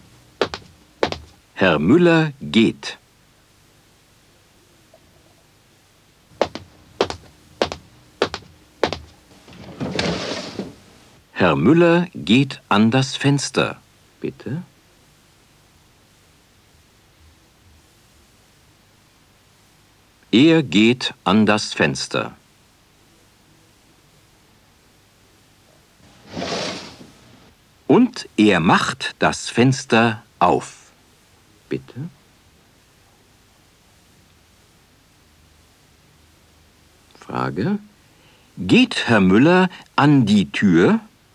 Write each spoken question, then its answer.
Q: Geht Herr Müller an die Tür?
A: Nein, er geht nicht an die Tür.